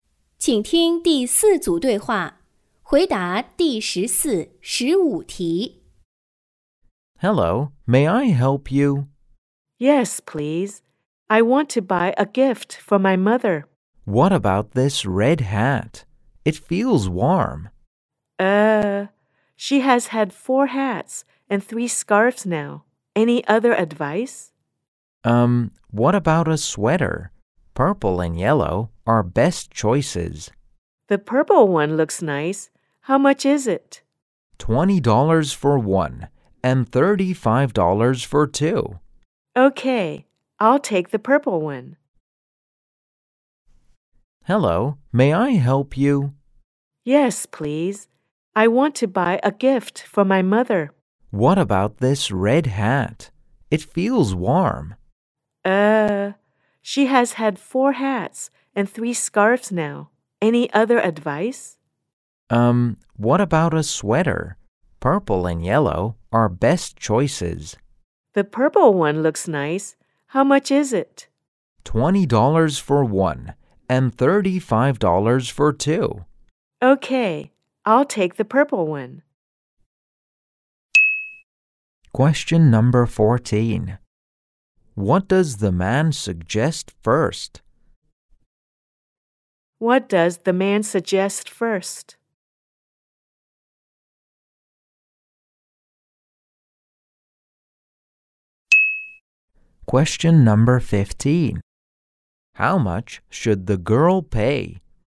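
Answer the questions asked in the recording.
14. A red hat
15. $20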